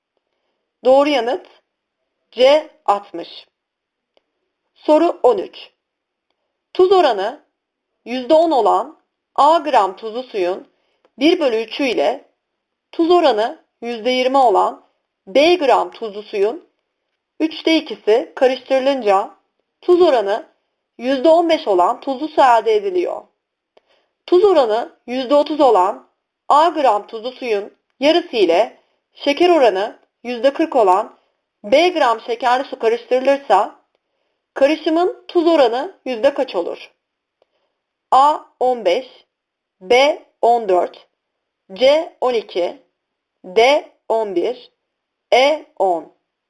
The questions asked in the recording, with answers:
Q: Tuz oranı %30 olan A gram tuzlu suyun yarısı ile şeker oranı %40 olan B gram şekerli su karıştırılırsa karışımın tuz oranı yüzde kaç olur?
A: Doğru yanıt A 15.